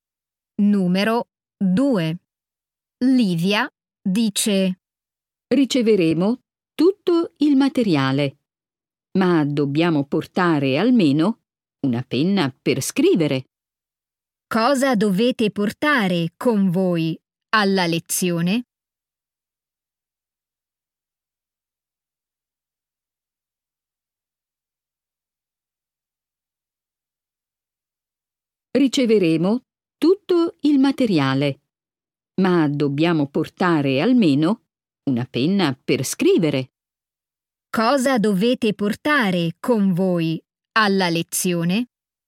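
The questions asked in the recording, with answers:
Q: Cosa dovete portare con voi alla lezione?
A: Una penna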